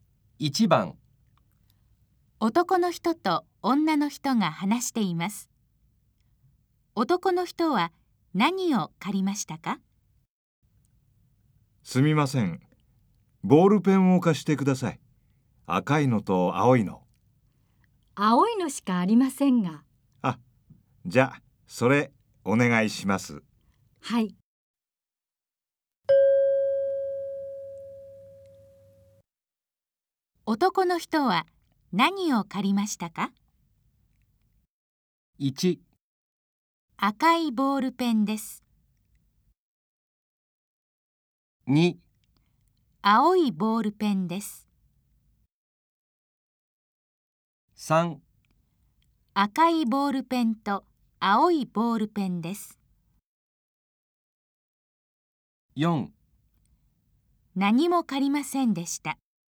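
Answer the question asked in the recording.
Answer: 2: 青いボールペンです。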